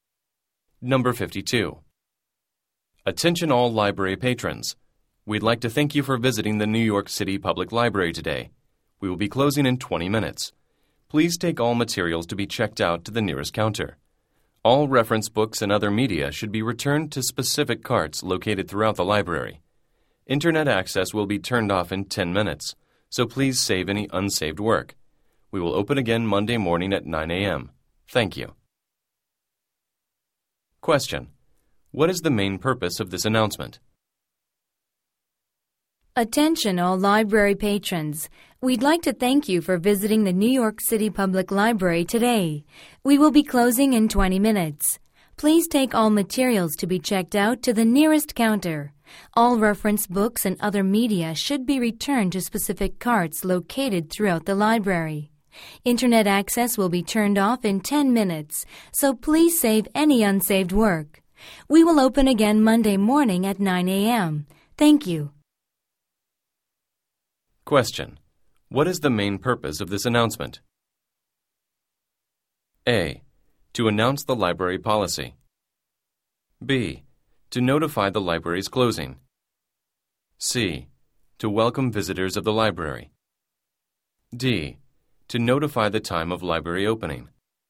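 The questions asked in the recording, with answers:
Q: What is the main purpose of this announcement?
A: B: To notify the library's closing.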